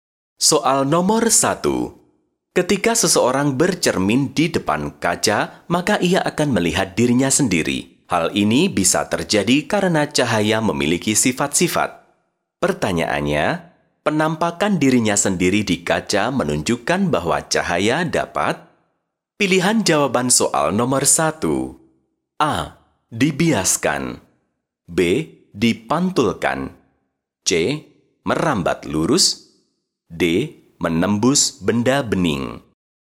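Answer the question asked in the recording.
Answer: B: Dipantulkan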